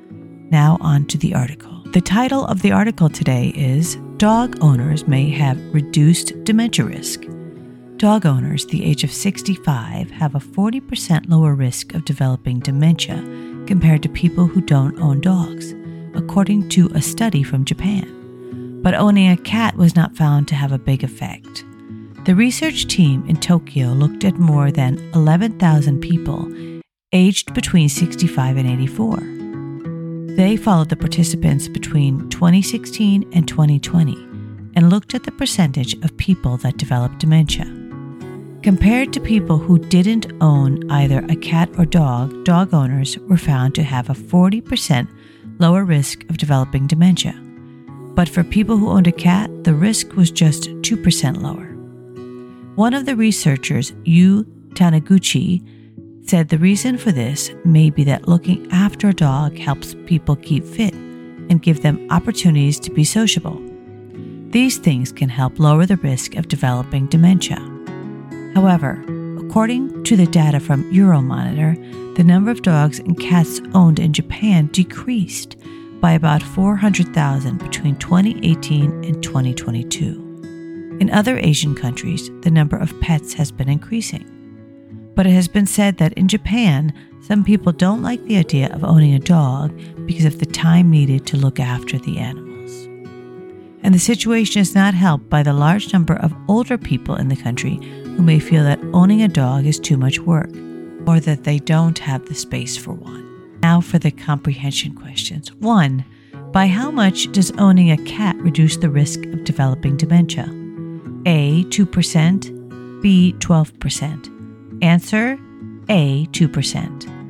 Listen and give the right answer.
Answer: Answer, A, 2%.